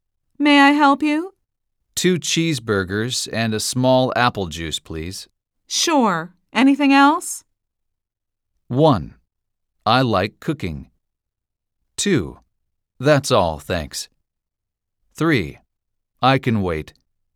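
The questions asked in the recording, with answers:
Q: Sure. Anything else?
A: 2: That's all, thanks.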